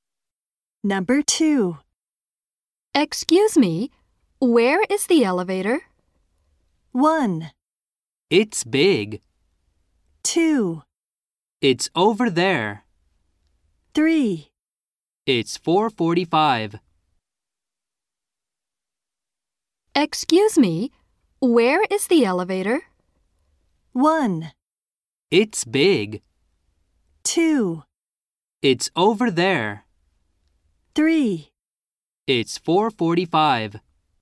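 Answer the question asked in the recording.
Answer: 2: It's over there.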